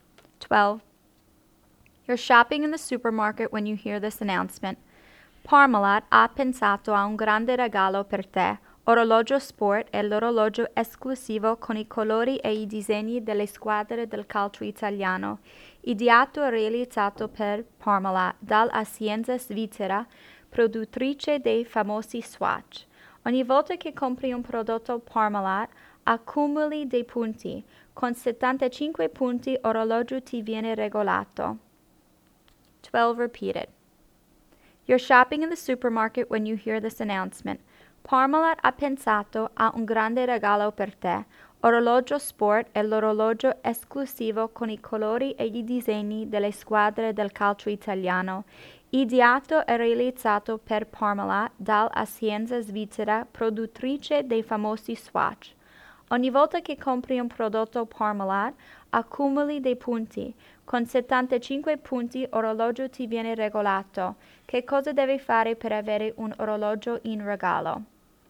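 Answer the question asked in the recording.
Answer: Comprare prodotti Parmalat e accumulare 75 punti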